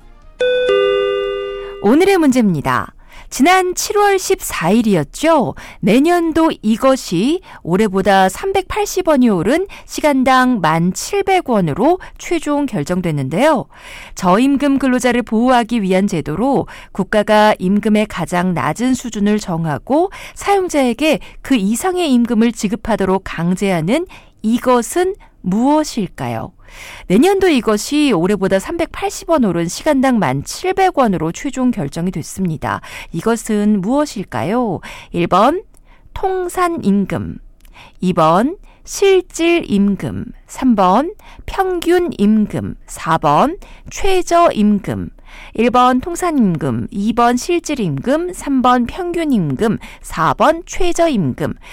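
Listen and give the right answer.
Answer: 4: 최저임금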